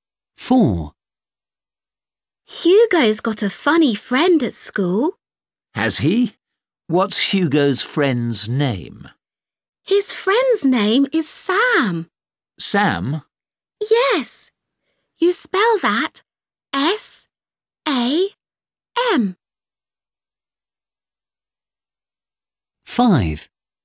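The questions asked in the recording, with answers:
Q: What's Hugo's friend's name?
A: Sam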